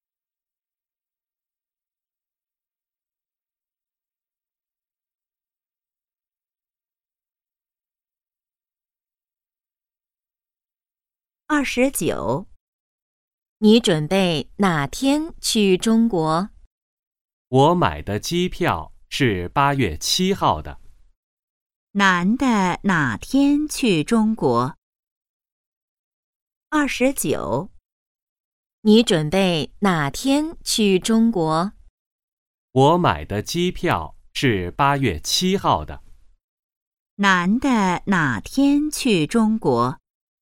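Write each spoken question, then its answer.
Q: 男的哪天去中国?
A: 8月7号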